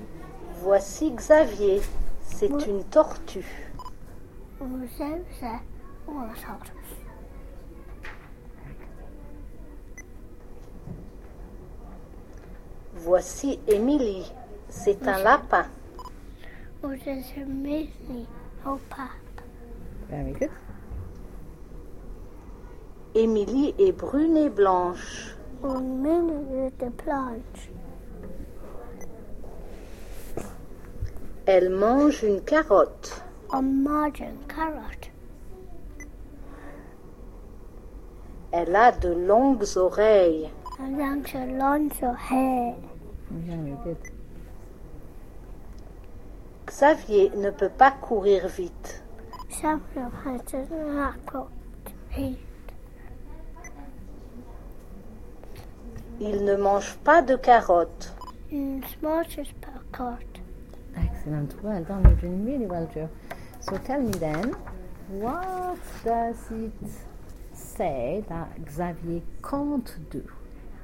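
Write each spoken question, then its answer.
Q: So tell me then, what does it say that Xavier can't do?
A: Run fast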